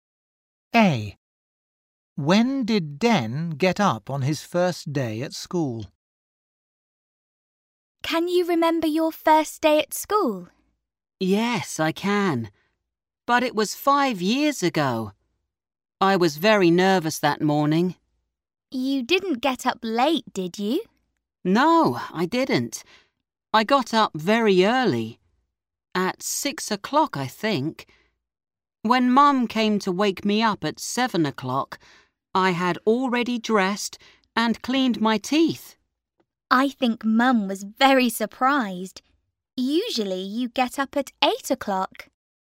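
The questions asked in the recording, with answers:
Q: When did Den get up on his first day at school?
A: At 6 o'clock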